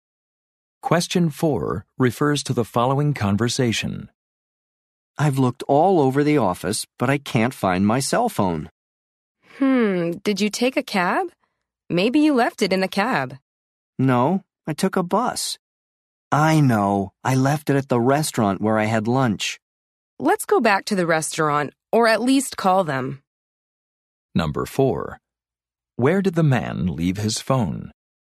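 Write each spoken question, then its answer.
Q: Where did the man leave his phone?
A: At the restaurant where he had lunch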